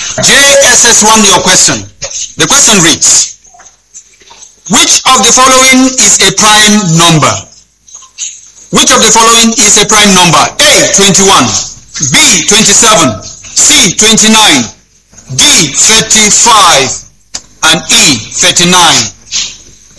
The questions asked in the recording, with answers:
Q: which of the following is a prime number?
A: The answer is 29.